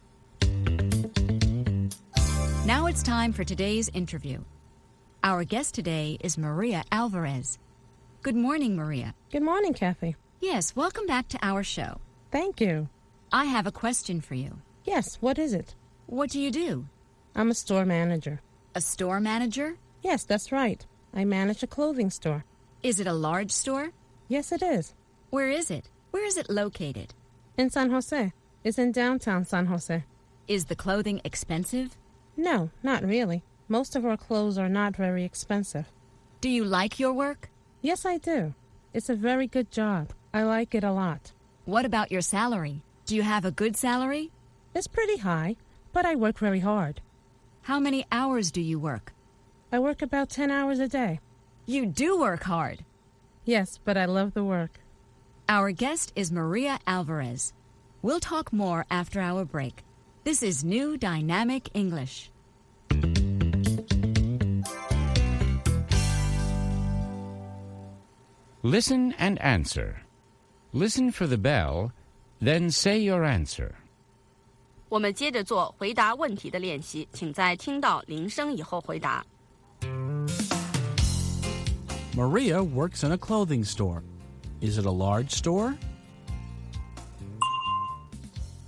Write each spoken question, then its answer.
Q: Is it a large store?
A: Yes, it is. It's large.